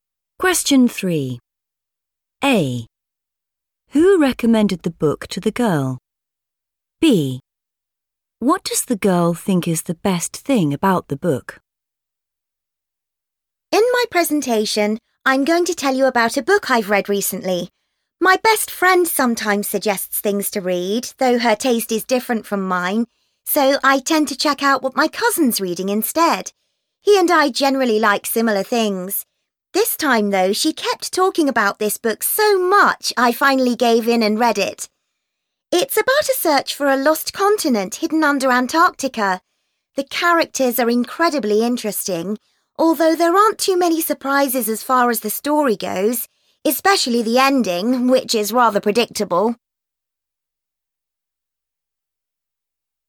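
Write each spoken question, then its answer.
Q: Who recommended the book to the girl?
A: her best friend

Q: What does the girl think is the best thing about the book?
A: the characters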